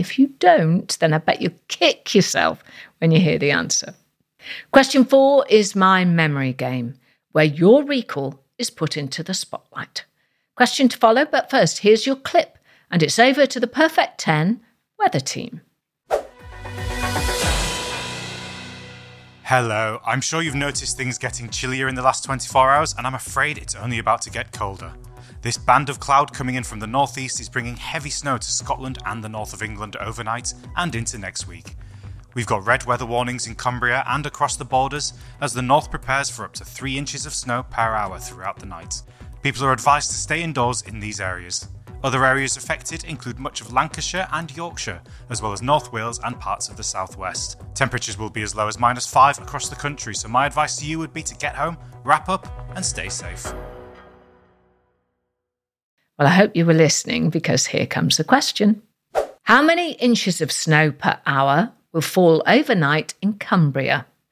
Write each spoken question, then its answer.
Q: How many inches of snow per hour will fall overnight in Cumbria?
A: The answer in the clip was 3 inches per hour.